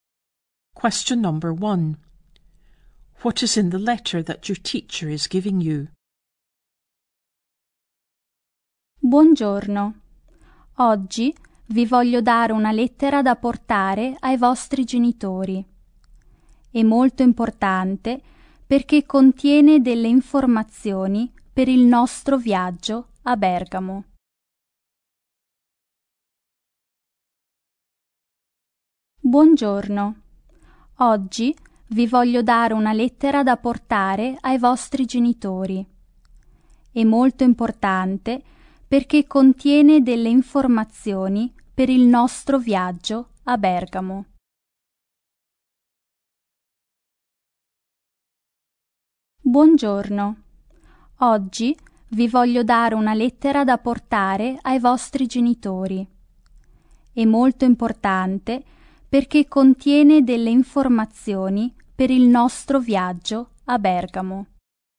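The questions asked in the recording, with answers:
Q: What is in the letter that your teacher is giving you?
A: Important information about the trip to Bergamo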